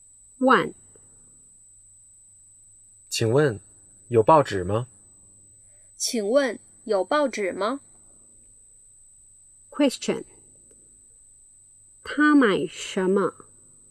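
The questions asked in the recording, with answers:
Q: 他买什么?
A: 报纸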